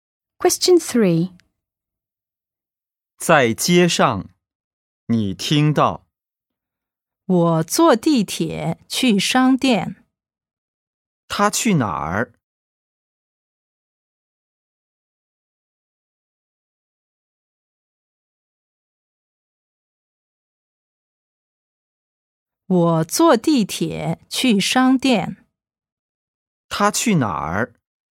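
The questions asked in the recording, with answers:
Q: 他去哪儿?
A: 商店(坐地铁去)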